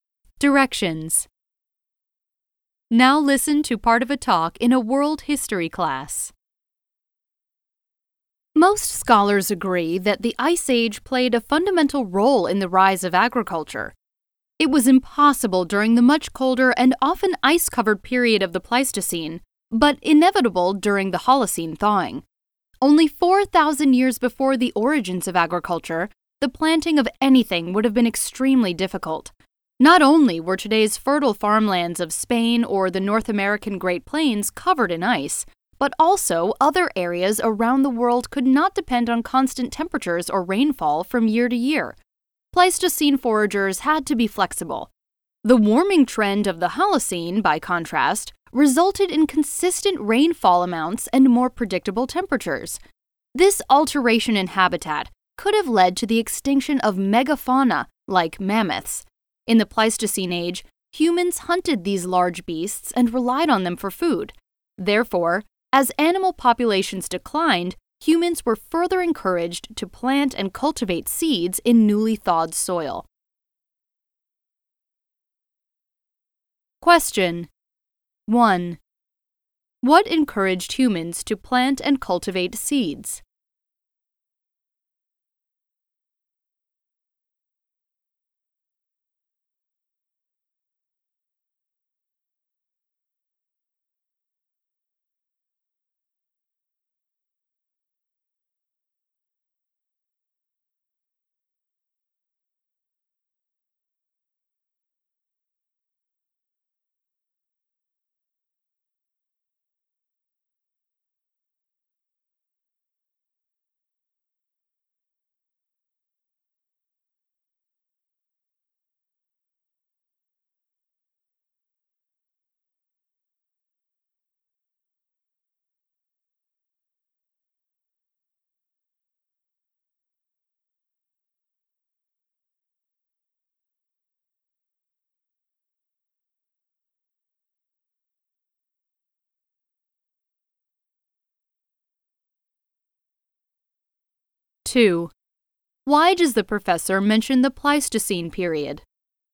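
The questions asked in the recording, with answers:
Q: What encouraged humans to plant and cultivate seeds?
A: The decline of large animal populations (megafauna) they had hunted for food, as the climate warmed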